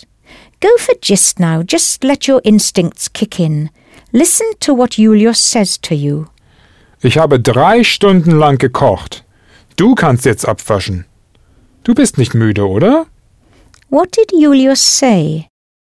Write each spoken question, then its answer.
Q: What did Julius say?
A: Yes, he said he's cooked for 3 hours.